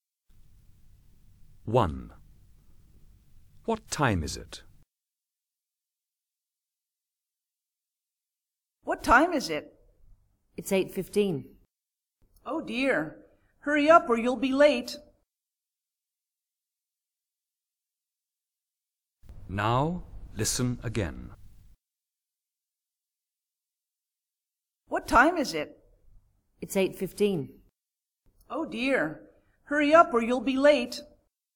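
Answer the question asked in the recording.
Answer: 8:15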